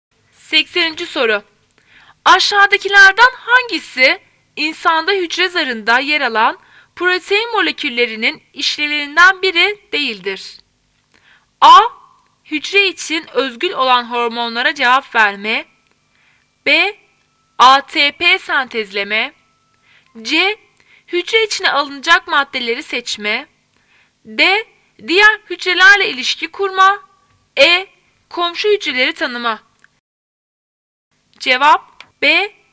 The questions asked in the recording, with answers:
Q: Aşağıdakilerden hangisi insanda hücre zarında yer alan protein moleküllerinin işlevlerinden biri değildir?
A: Cevap B.